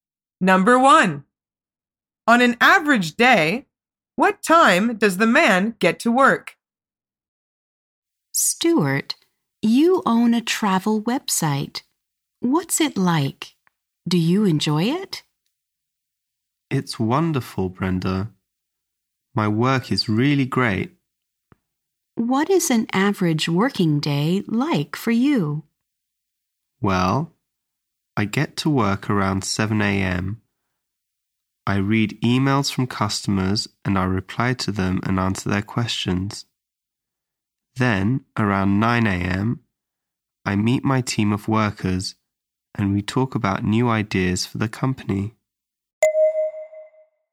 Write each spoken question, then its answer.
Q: On an average day, what time does the man get to work?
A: The answer is around 7 a.m.